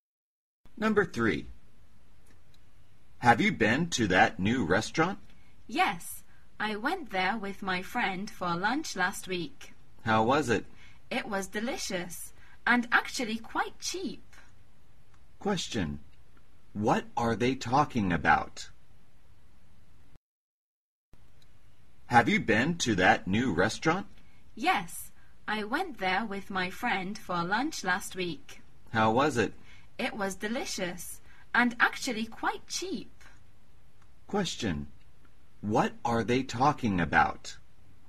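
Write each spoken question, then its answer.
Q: What are they talking about?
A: A new restaurant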